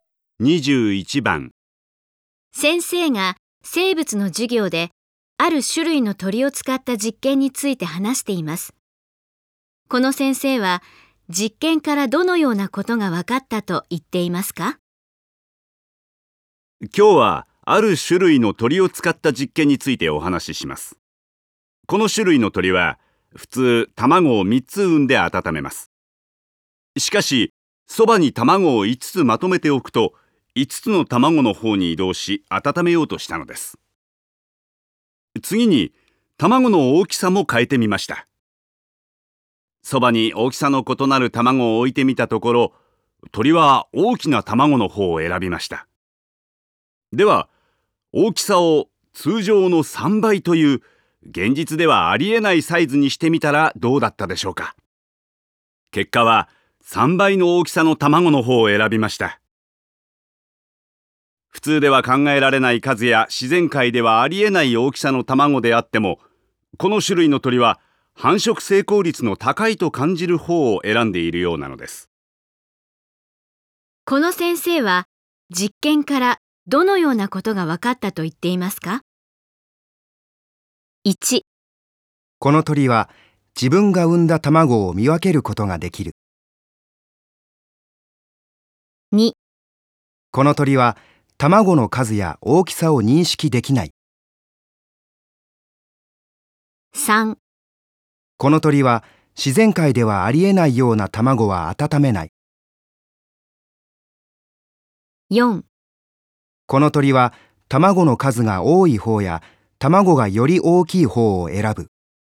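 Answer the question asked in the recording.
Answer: 4: この鳥は卵の数が多い方や卵がより大きい方を選ぶ。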